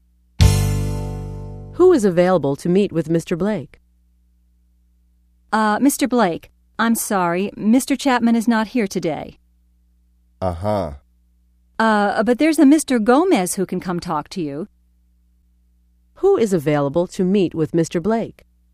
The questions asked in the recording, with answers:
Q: Who is available to meet with Mr. Blake?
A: Mr. Gomez will meet with Mr. Blake.